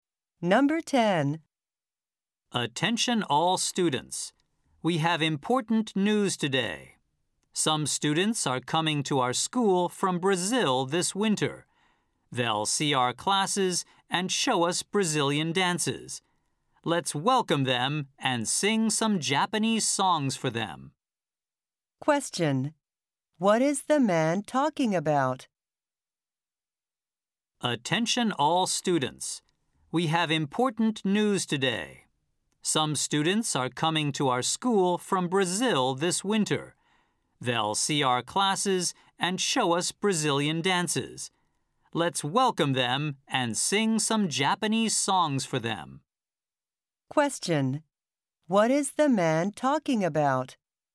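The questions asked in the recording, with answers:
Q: What is the man talking about?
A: Students from Brazil coming to visit their school this winter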